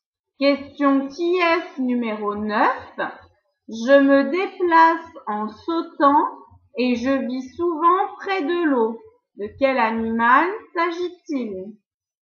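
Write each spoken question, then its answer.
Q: De quel animal s'agit-il?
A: la grenouille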